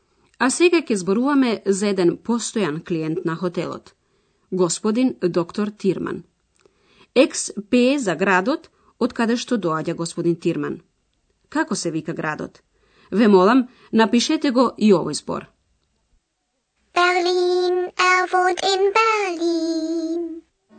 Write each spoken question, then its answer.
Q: Како се вика градот?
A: Како петто се бараше градот Берлин.